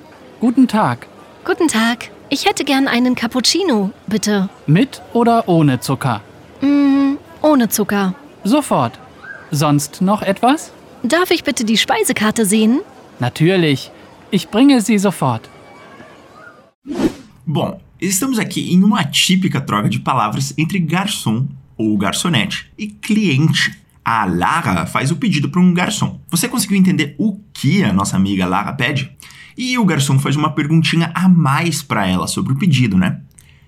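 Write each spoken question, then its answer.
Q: Você conseguiu entender o que a nossa amiga Lara pede?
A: Um cappuccino sem açúcar (e o cardápio)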